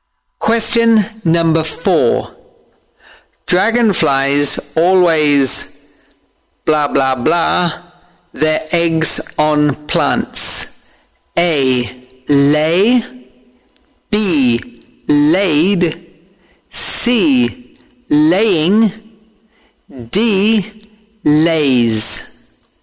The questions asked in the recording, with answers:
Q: Dragonflies always blah blah blah their eggs on plants.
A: A. Lay.